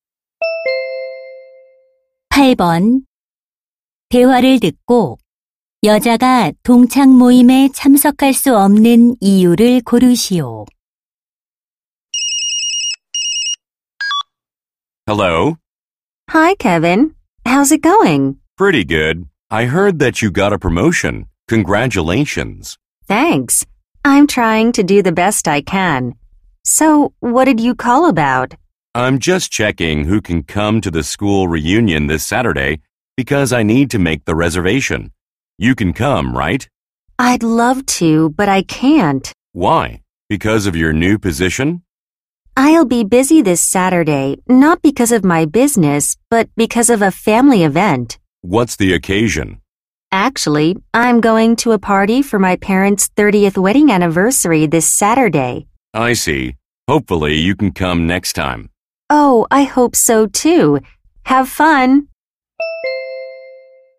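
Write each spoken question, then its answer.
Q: 8번대화를듣고여자가동창모임에참석할수없는이유를고르시오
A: 부모님 결혼 30주년 기념 파티에 가야 해서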